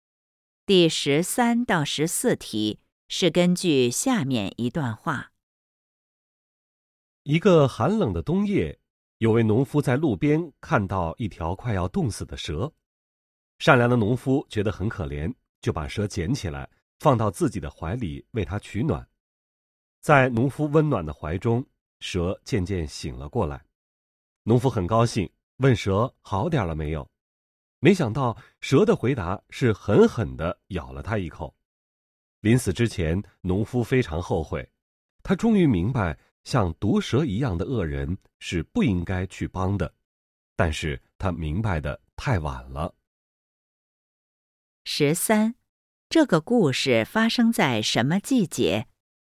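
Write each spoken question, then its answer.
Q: 这个故事发生在什么季节?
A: 冬天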